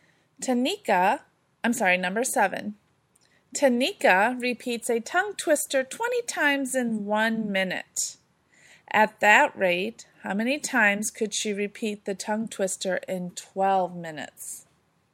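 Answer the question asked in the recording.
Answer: 240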